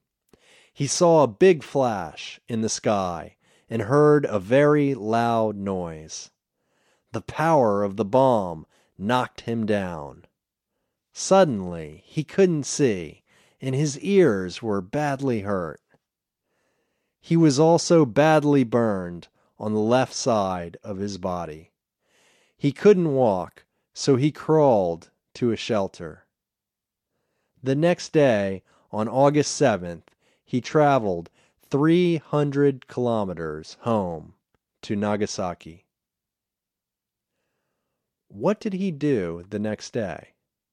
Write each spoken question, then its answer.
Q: What did he do the next day?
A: The next day, he traveled 300 kilometers home to Nagasaki.